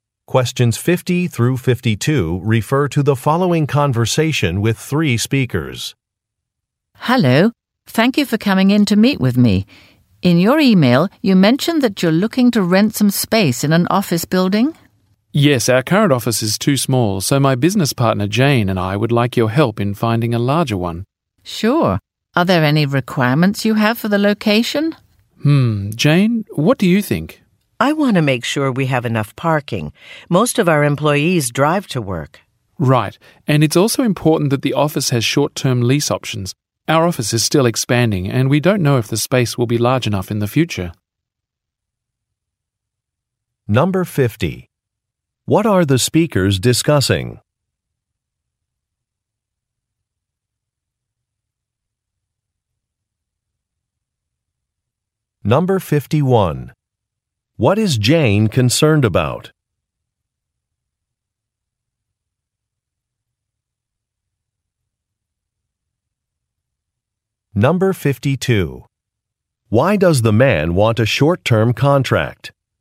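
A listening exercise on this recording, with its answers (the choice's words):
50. What are the speakers discussing?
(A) Renting some office space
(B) Reserving a banquet hall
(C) Purchasing a car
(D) Finding an apartment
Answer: Renting some office space

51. What is Jane concerned about?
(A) Access to wireless Internet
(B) The availability of parking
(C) The size of a budget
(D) The proximity to a city center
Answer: The availability of parking

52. Why does the man want a short-term contract?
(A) He needs to raise more money.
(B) He is moving to a new city.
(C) A company is growing.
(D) A business agreement may change.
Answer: A company is growing.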